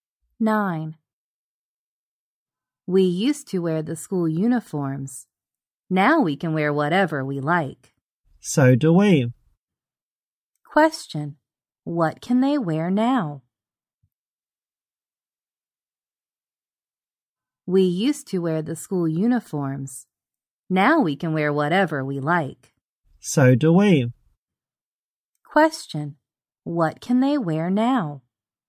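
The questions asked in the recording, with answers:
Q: What can they wear now?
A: Whatever they like.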